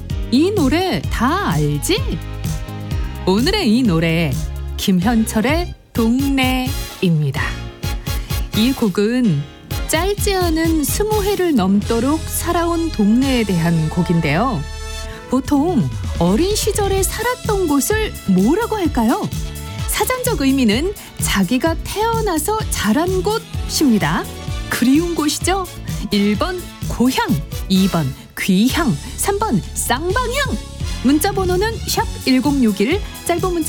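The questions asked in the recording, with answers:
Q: 보통 어린 시절에 살았던 곳을 뭐라고 할까요?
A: 1: 고향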